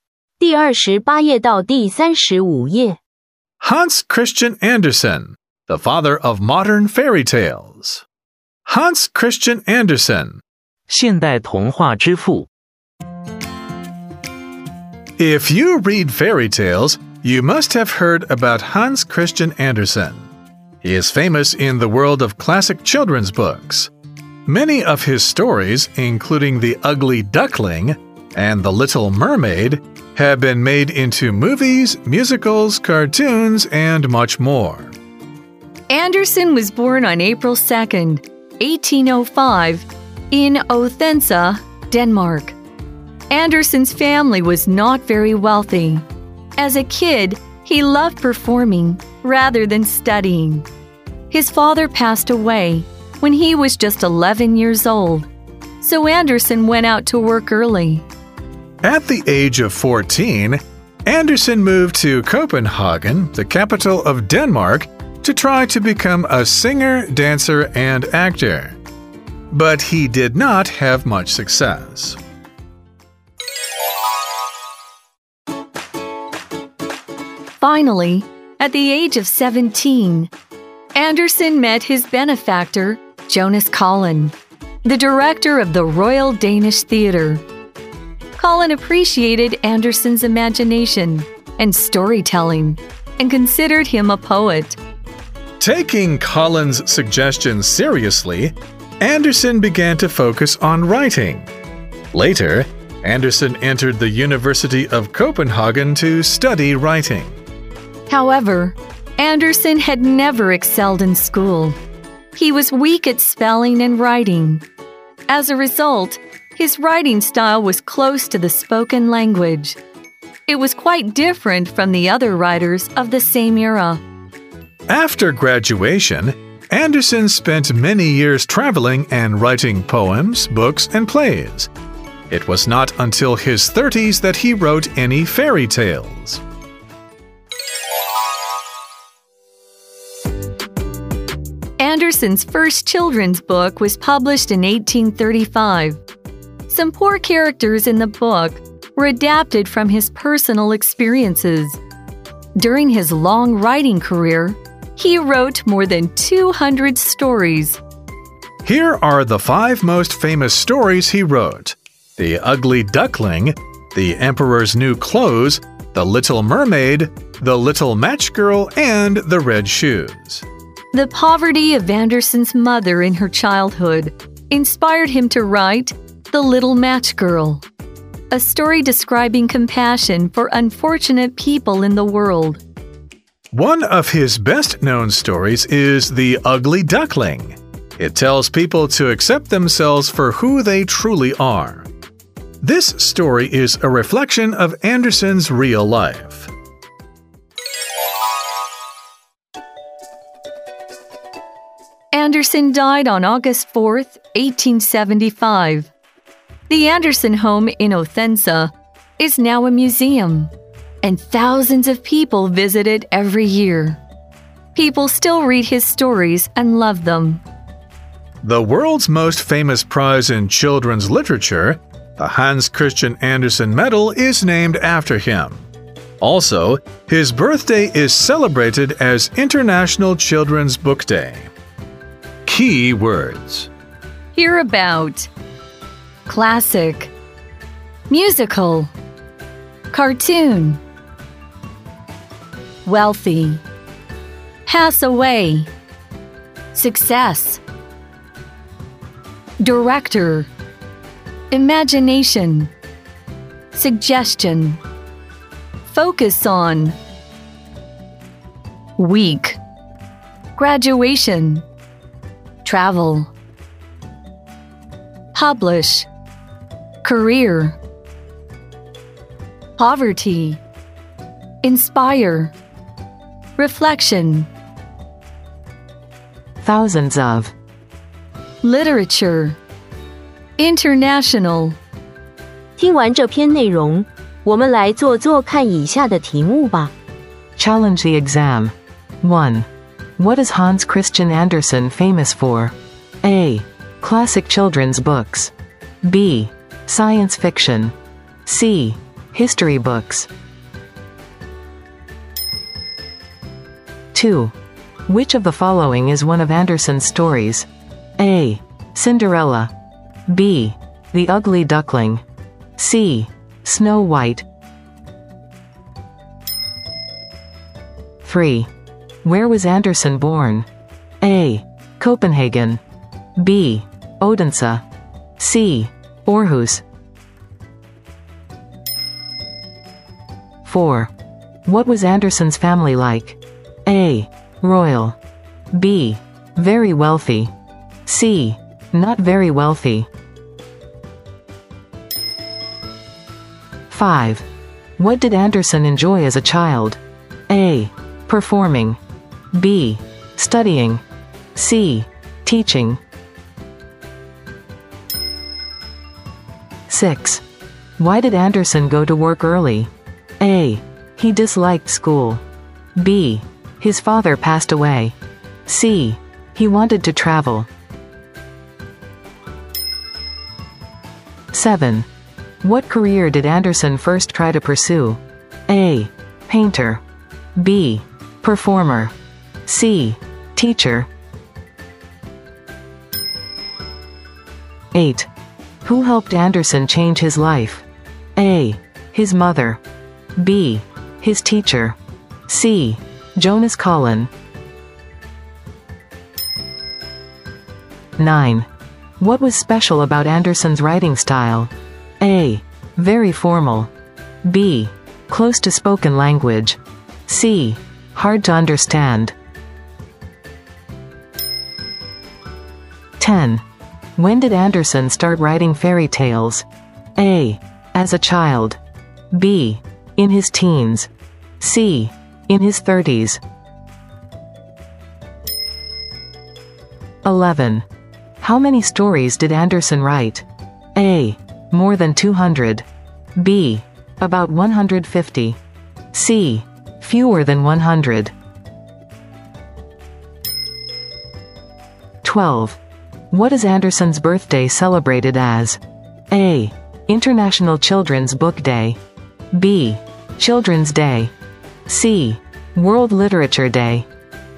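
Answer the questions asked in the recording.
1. A: Classic children's books.
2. B: The Ugly Duckling.
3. B: Odense.
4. C: Not very wealthy.
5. A: Performing.
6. B: His father passed away.
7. B: Performer.
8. C: Jonas Collin.
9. B: Close to spoken language.
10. C: In his 30s.
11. A: More than 200.
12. A: International Children's Book Day.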